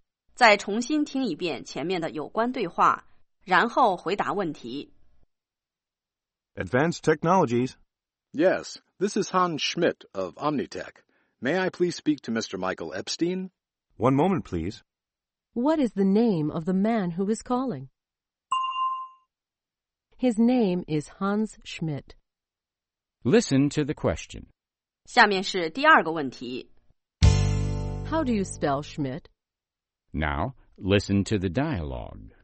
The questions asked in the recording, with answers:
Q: What is the name of the man who is calling?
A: His name is Hans Schmidt.